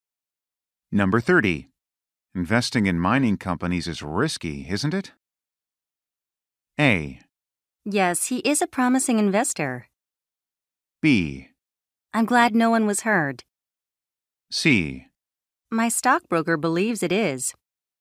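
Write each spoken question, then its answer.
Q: Investing in mining companies is risky, isn't it?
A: C: My stockbroker believes it is.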